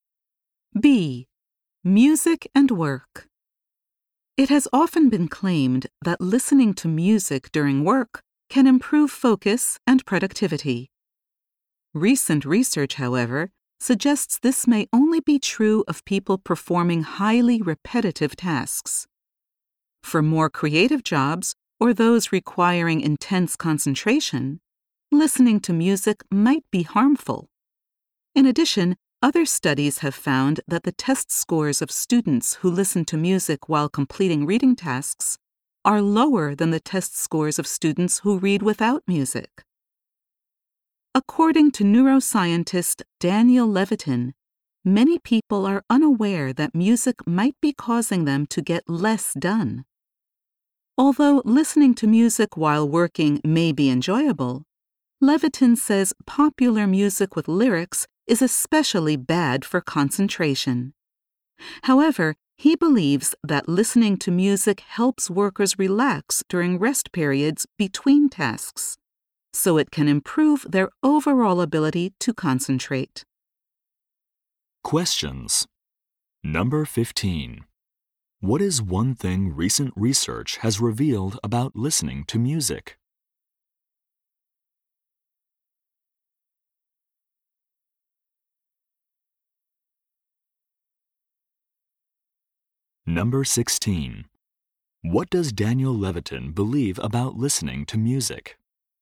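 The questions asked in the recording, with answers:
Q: What is one thing recent research has revealed about listening to music?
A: It may only improve focus for people doing highly repetitive tasks.

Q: What does Daniel Levitin believe about listening to music?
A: Listening during rest periods between tasks helps workers relax and can improve overall concentration.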